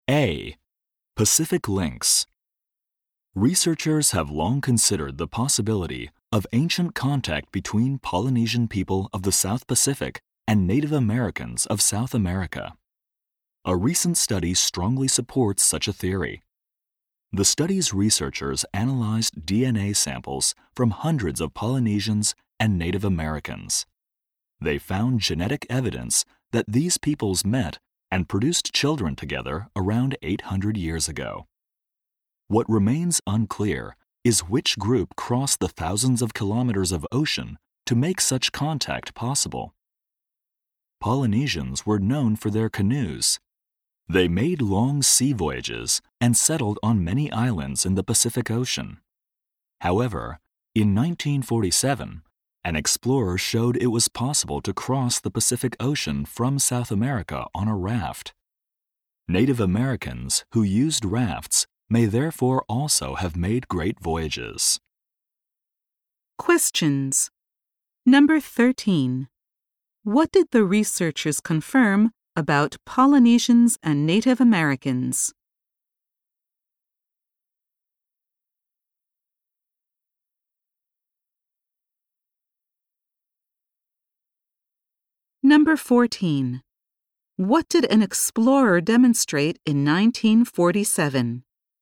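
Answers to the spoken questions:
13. They met and had children together around 800 years ago.
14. That it was possible to cross the Pacific Ocean from South America on a raft.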